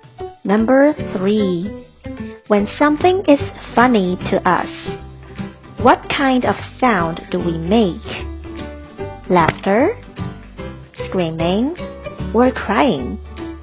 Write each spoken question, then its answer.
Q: When something is funny to us, what kind of sound do we make?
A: The answer is laughter.